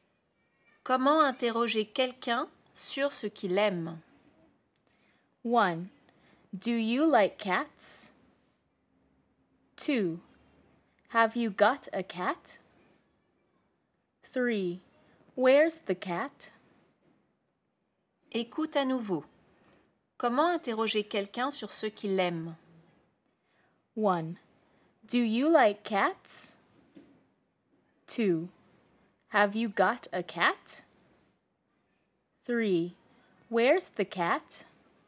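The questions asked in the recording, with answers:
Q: Comment interroger quelqu'un sur ce qu'il aime?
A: 1: Do you like cats?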